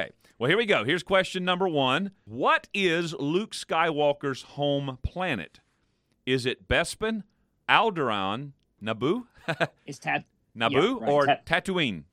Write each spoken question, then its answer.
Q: What is Luke Skywalker's home planet?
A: Tatooine.